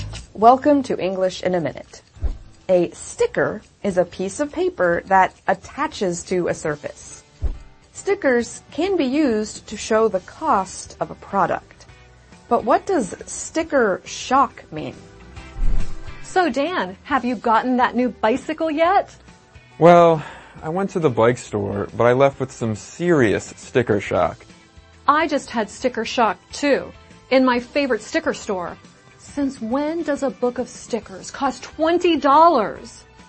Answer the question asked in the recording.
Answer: Sticker shock is used to describe the surprise and disappointment someone feels when they find out how much something costs.